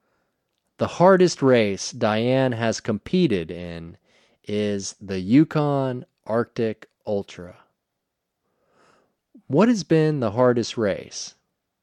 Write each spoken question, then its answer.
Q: What has been the hardest race?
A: The Yukon Arctic Ultra has been the hardest race.